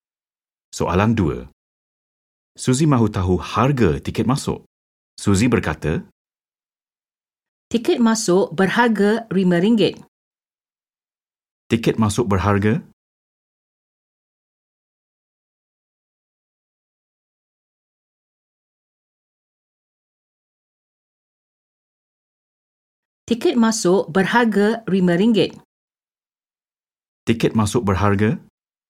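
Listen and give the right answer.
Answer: RM5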